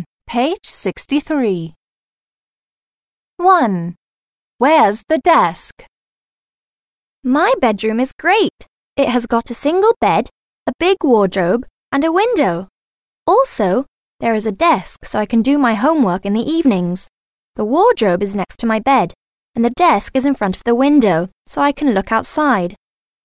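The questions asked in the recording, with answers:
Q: Where's the desk?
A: In front of the window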